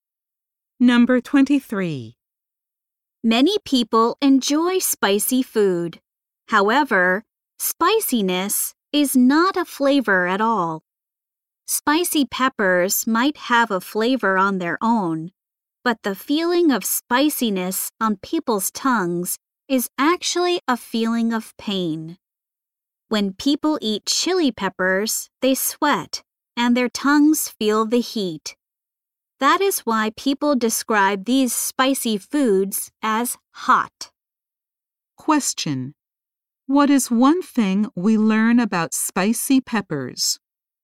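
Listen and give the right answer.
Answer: Their spiciness is actually a feeling of pain, not a flavor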